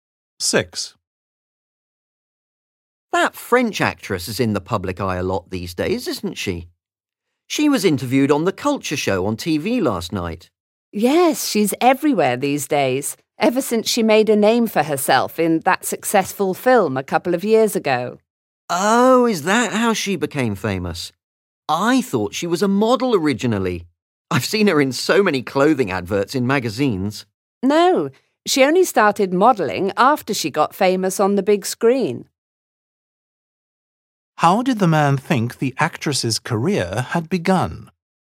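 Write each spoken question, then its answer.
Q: How did the man think the actress's career had begun?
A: as a model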